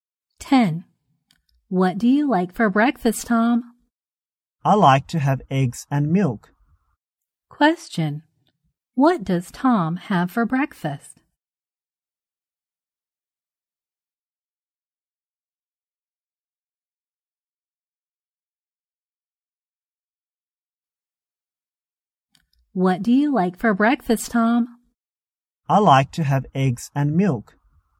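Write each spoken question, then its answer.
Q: Question, what does Tom have for breakfast?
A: Eggs and milk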